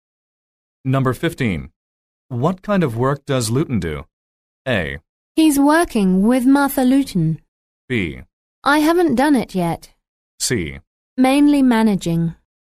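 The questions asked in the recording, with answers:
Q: What kind of work does Luton do?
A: C: Mainly managing.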